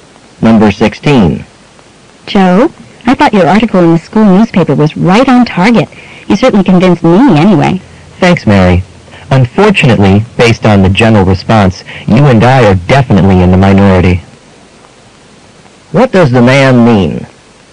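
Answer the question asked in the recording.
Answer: Most people disagreed with his article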